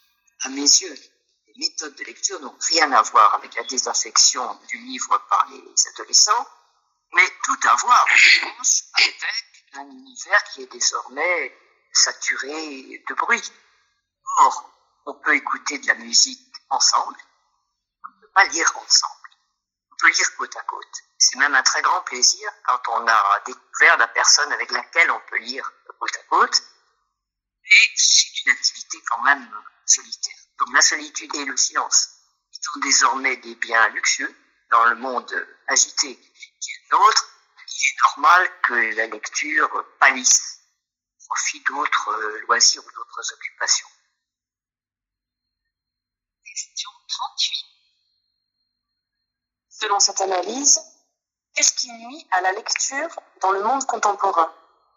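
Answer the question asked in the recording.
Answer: Le bruit permanent et l'agitation : la lecture demande solitude et silence, devenus des biens rares.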